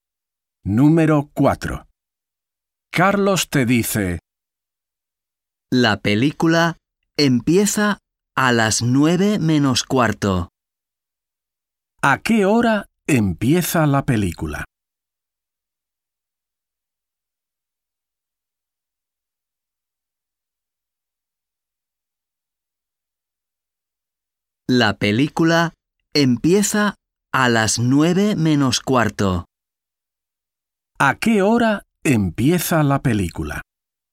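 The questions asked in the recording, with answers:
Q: ¿A qué hora empieza la película?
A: a las 9:45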